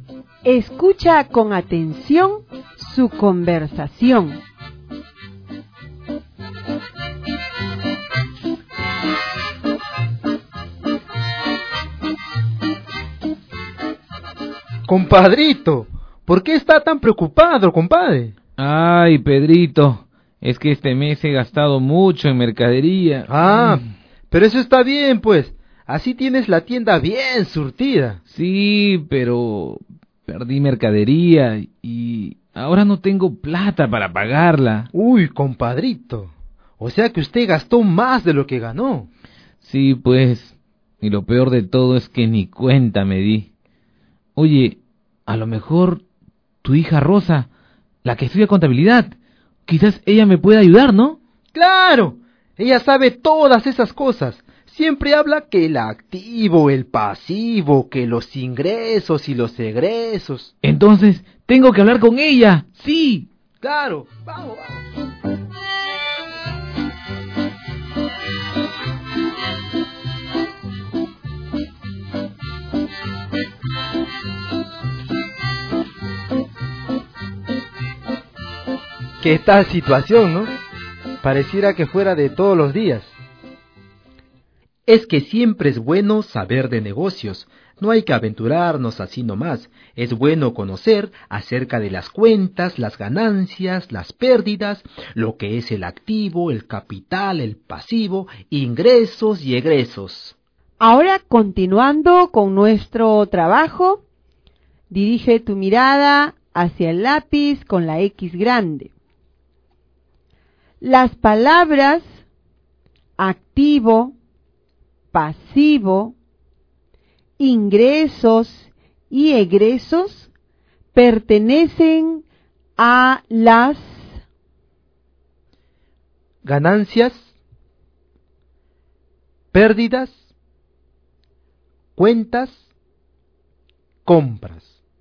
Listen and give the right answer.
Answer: La alternativa correcta era la letra C, cuentas.